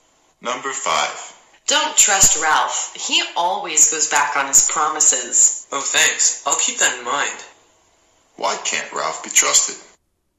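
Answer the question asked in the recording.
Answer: He always breaks his promises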